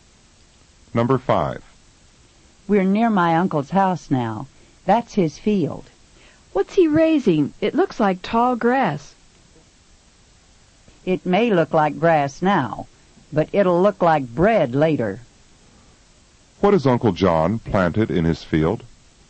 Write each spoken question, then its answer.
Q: What has Uncle John planted in his field?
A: The crop that looks like tall grass is wheat.